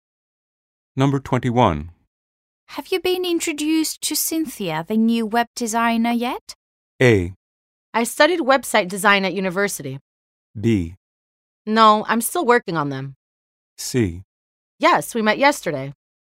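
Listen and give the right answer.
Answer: C: Yes, we met yesterday.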